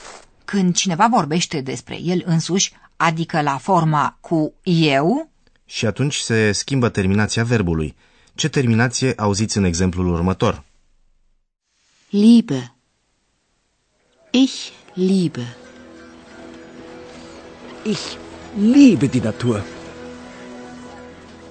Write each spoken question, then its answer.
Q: Ce terminație auziți în exemplul următor?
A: La forma cu eu se pune așadar terminația e.